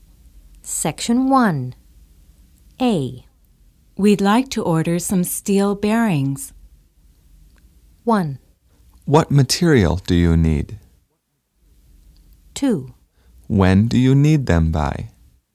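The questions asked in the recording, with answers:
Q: We'd like to order some steel bearings.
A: 2: When do you need them by?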